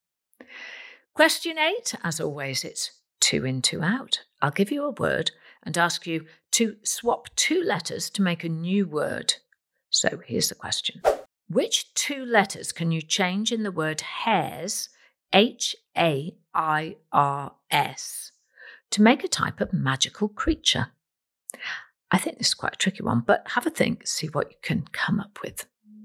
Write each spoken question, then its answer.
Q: Which two letters can you change in the word hairs, H A I R S, to make a type of magical creature?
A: Well, if you change the letter H for an F and change the letter S into a Y, you get fairy, F A I R Y.